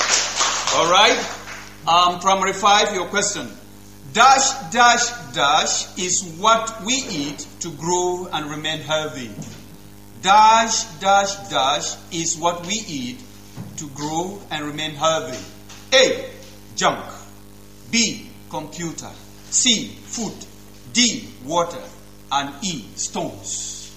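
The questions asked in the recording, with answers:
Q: Dash, dash, dash is what we eat to grow and remain healthy.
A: C: Food.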